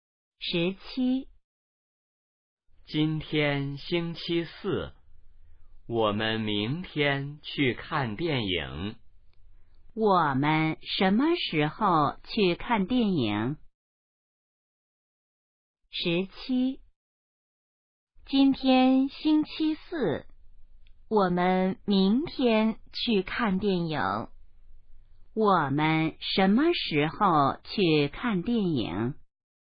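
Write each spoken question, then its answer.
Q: 我们什么时候去看电影?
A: 明天(星期五)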